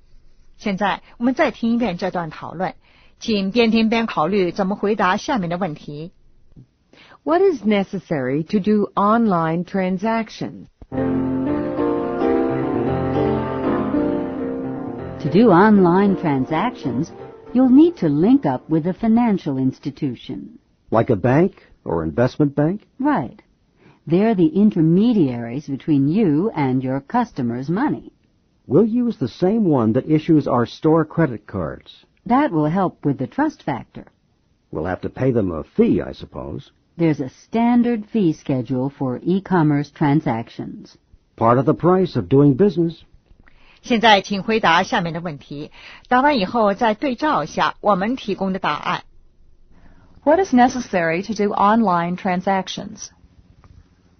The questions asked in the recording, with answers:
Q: What is necessary to do online transactions?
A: A financial institution.